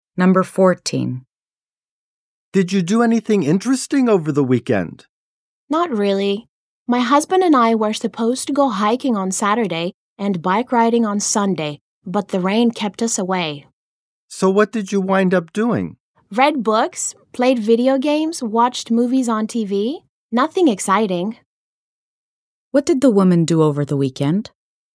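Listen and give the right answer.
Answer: She stayed in because of the rain: read books, played video games and watched movies on TV.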